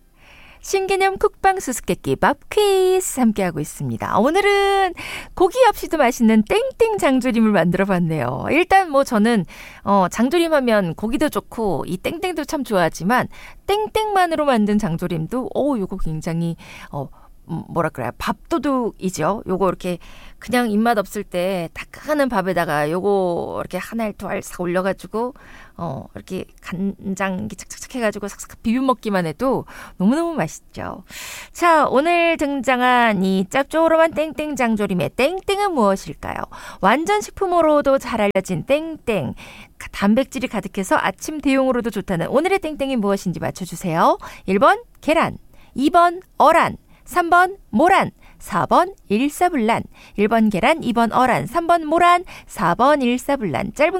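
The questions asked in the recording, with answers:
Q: 자, 오늘 등장한 이 짭조름한 땡땡 장조림의 땡땡은 무엇일까요?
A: 1: 계란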